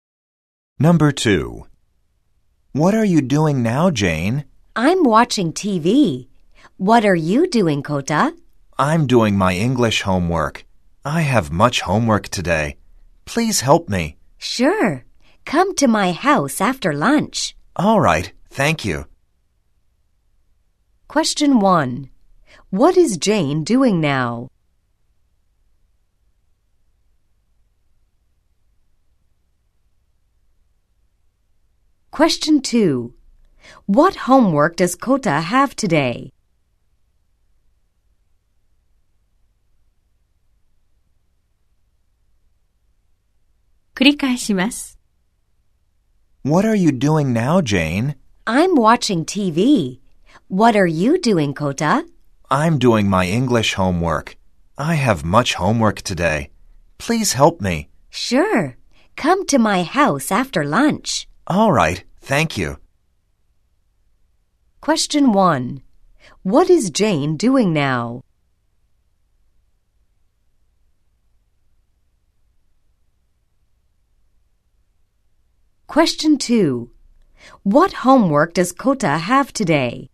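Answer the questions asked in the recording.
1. テレビを見ている
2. 英語の宿題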